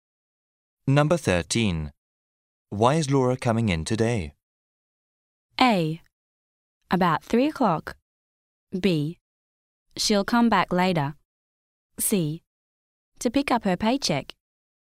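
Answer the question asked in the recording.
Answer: C: To pick up her paycheck.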